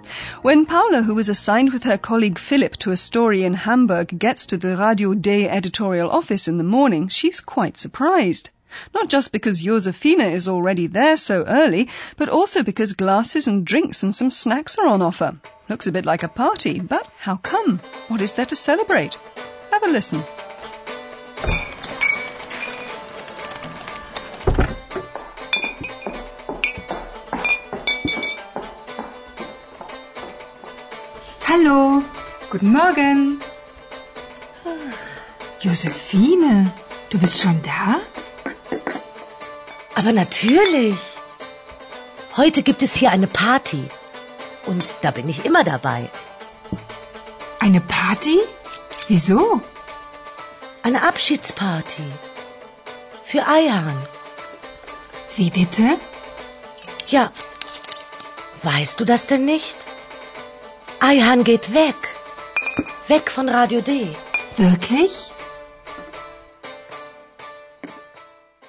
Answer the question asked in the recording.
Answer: The little party you'll have heard is for Ayhan.